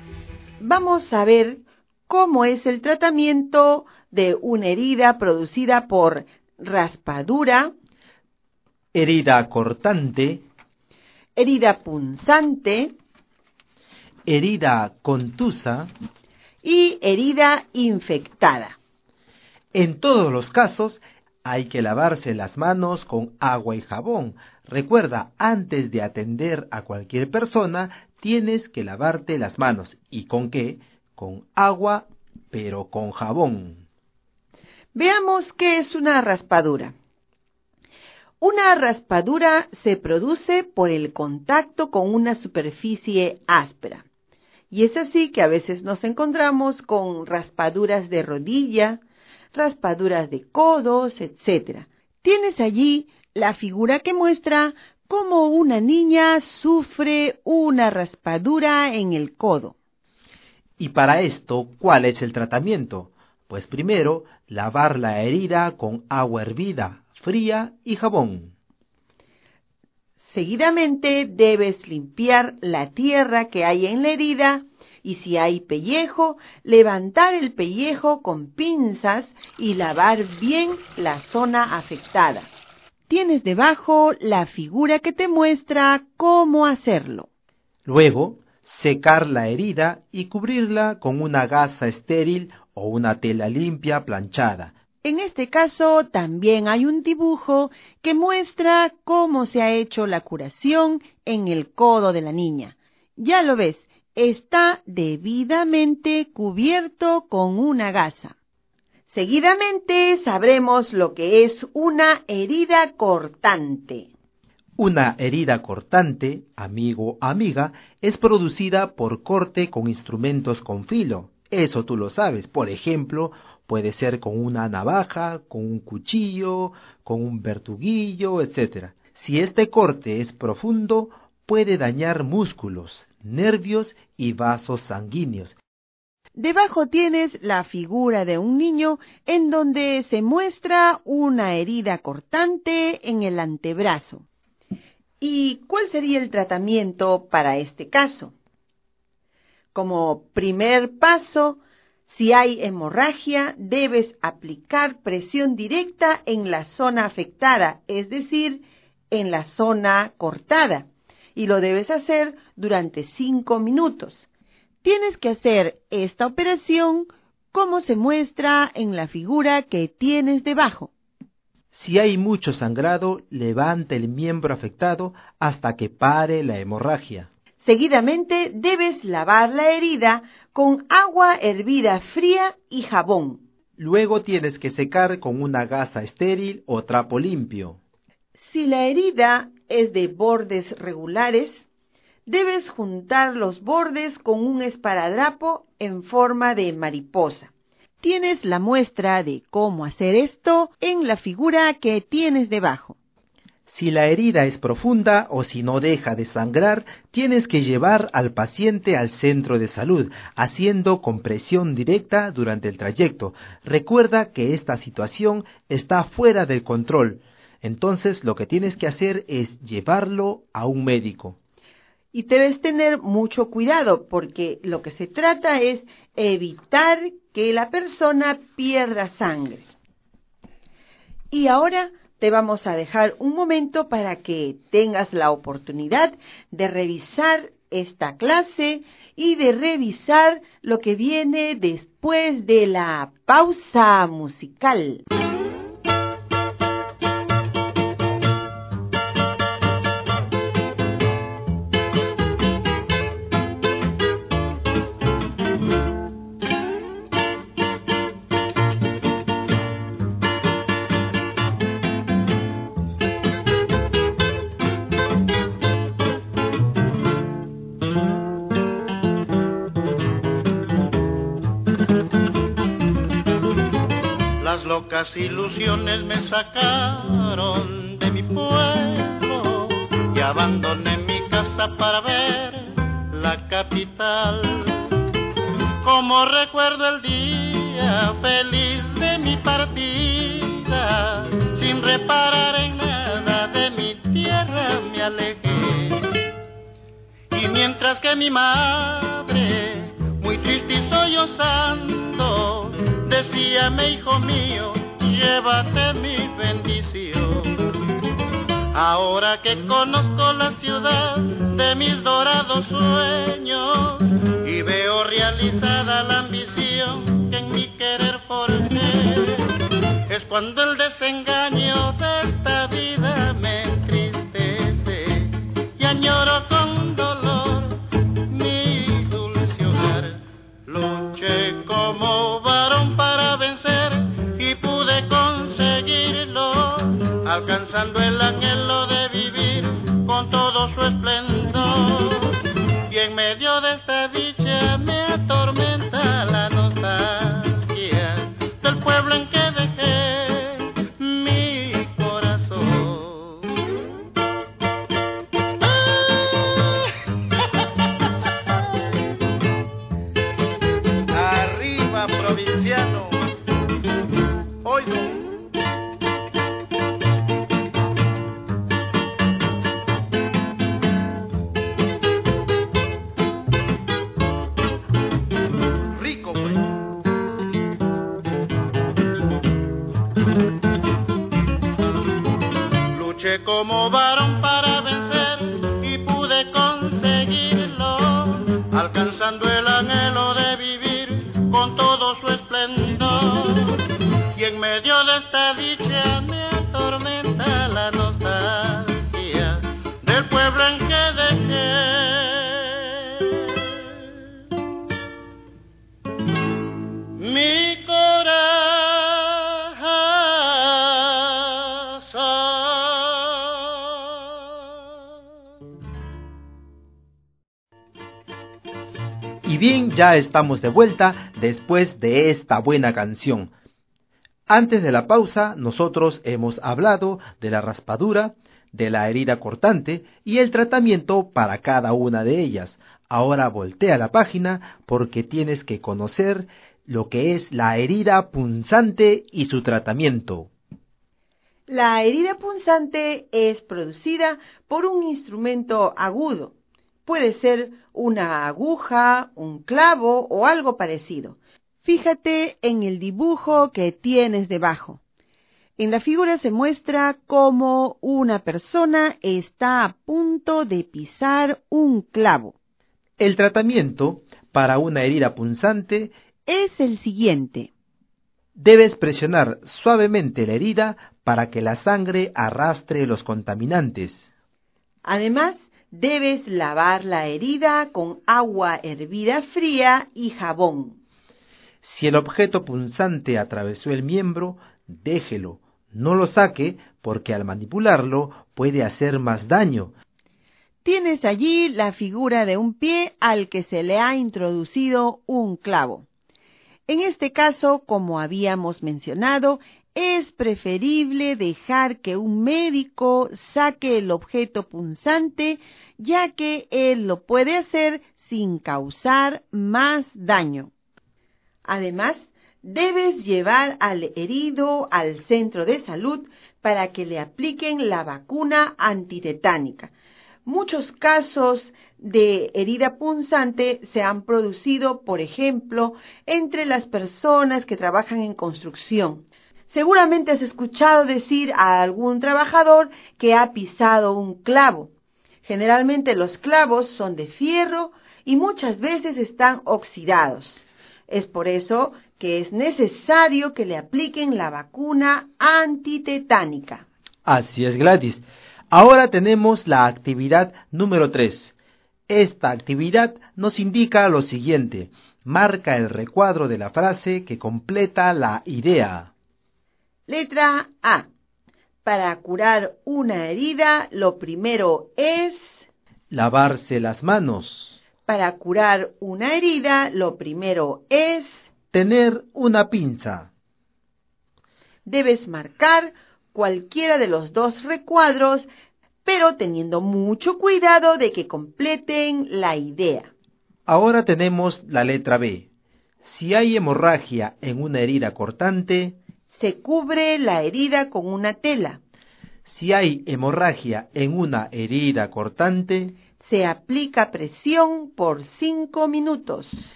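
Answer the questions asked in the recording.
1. lavarse las manos
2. se aplica presión por 5 minutos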